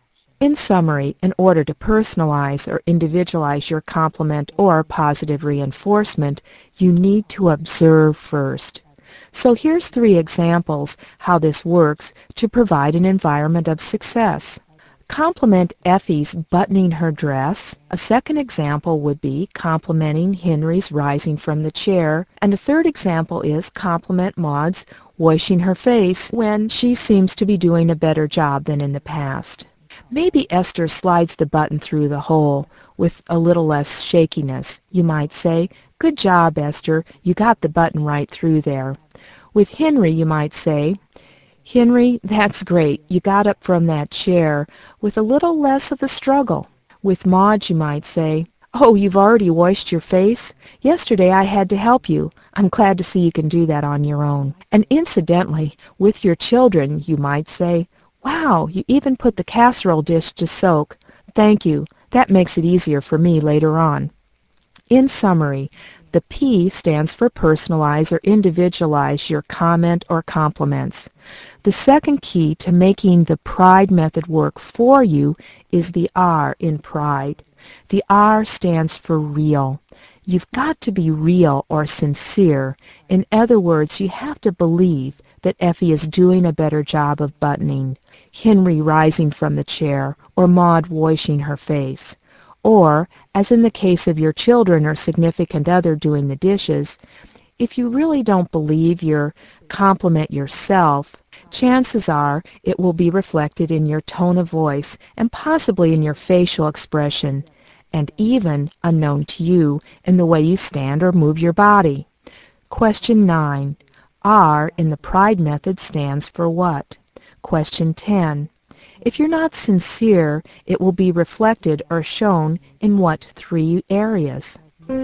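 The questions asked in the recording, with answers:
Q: R in the pride method stands for what?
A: Real (sincere)

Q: If you're not sincere, it will be reflected or shown in what 3 areas?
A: Tone of voice, facial expression, and body movement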